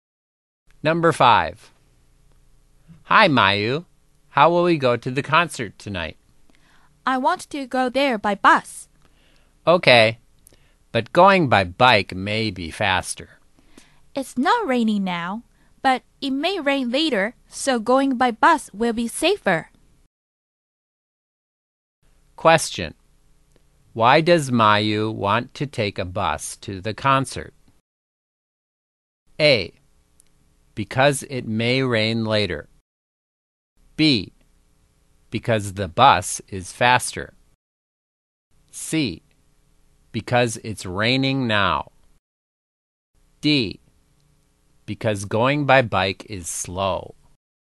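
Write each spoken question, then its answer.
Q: Why does Mayu want to take a bus to the concert?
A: A: Because it may rain later.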